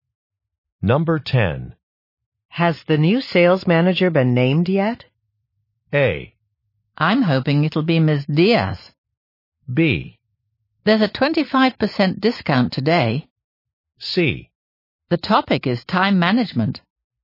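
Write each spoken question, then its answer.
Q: Has the new sales manager been named yet?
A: A: I'm hoping it'll be Ms. Diaz.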